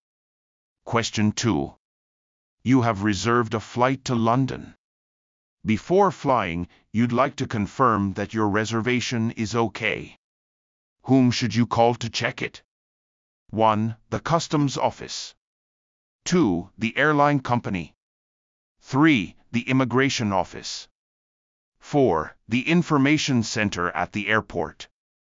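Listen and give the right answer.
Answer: 2: The airline company.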